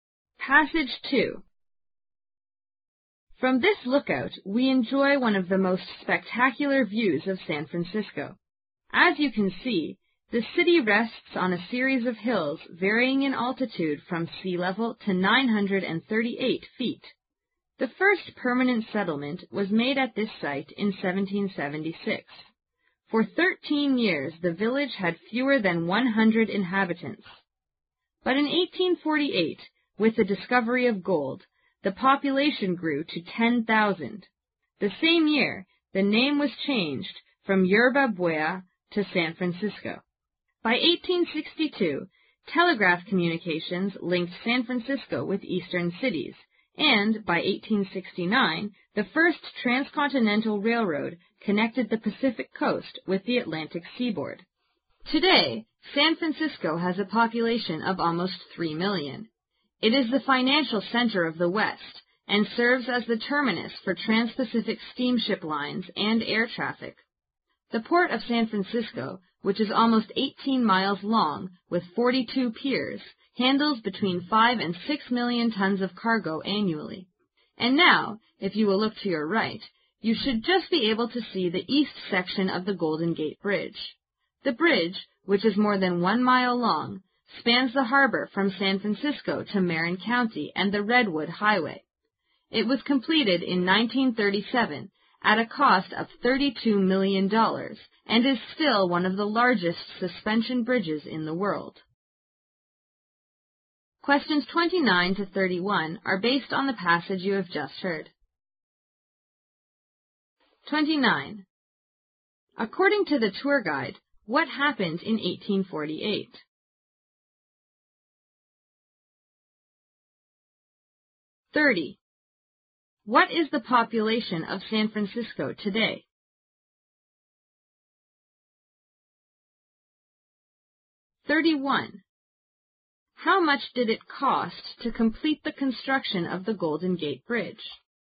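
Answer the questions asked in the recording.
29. Gold was discovered and the population grew to 10,000
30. Almost 3 million
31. $32 million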